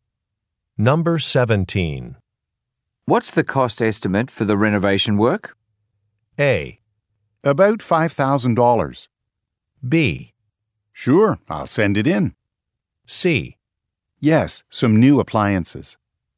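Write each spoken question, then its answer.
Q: What's the cost estimate for the renovation work?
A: A: About $5,000.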